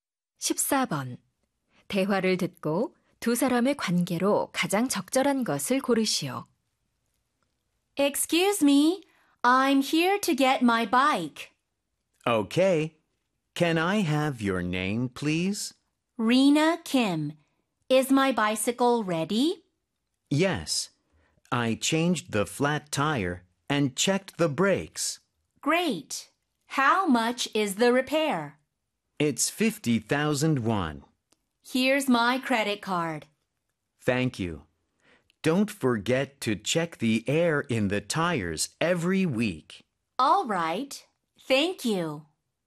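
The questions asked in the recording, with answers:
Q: 대화를 듣고 두 사람의 관계로 가장 적절한 것을 고르시오.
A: 자전거 수리공 - 고객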